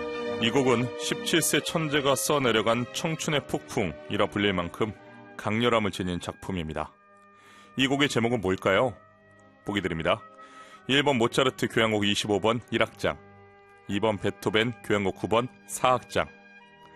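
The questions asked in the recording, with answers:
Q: 이 곡의 제목은 뭘까요?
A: 1번: 모차르트 교향곡 25번 1악장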